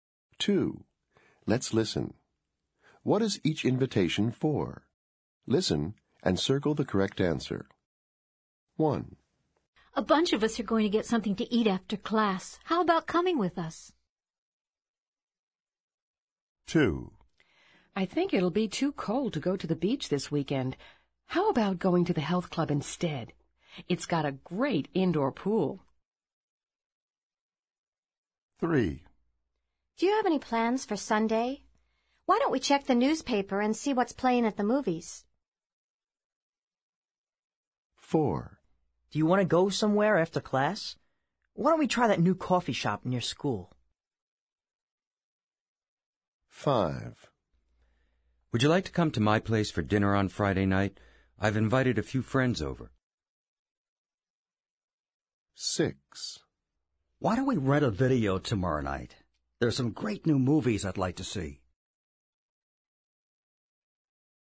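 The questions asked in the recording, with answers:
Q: What is each invitation for?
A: to get something to eat after class

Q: What is each invitation for?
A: to go to the health club (indoor pool)

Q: What is each invitation for?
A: to go to the movies on Sunday

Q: What is each invitation for?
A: to go to a new coffee shop

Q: What is each invitation for?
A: dinner on Friday night

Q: What is each invitation for?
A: to rent a video tomorrow night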